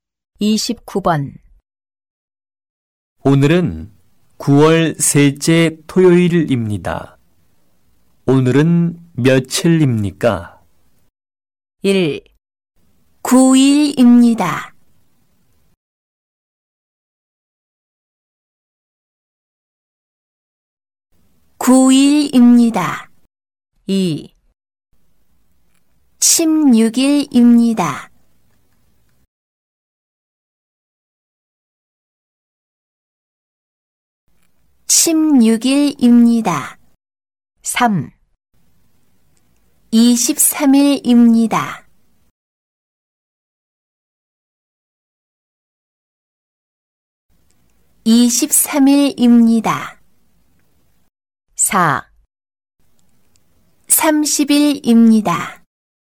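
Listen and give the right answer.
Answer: 2: 16일입니다.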